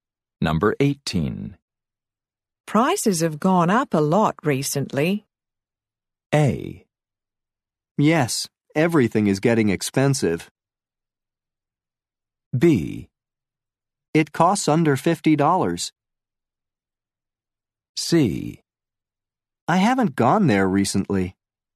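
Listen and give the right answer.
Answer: A: Yes, everything is getting expensive.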